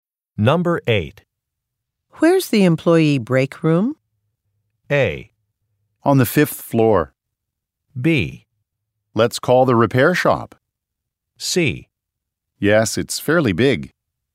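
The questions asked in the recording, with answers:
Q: Where's the employee break room?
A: A: On the 5th floor.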